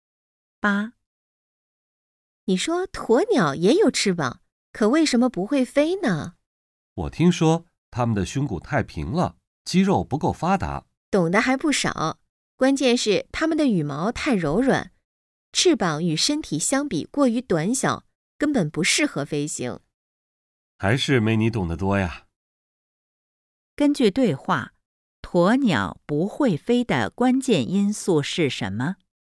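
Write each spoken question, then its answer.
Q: 根据对话,鸵鸟不会飞的关键因素是什么?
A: 羽毛太柔软,翅膀与身体相比过于短小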